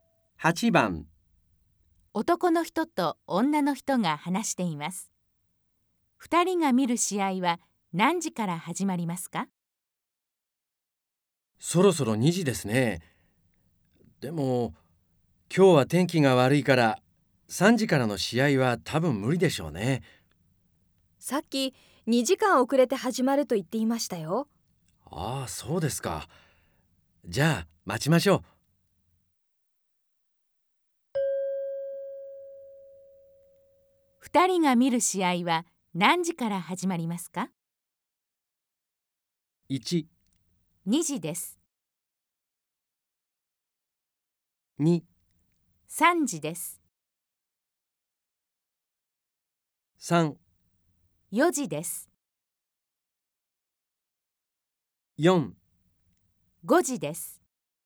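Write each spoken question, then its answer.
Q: 二人が見る試合は何時から始まりますか?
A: 4: 5時です。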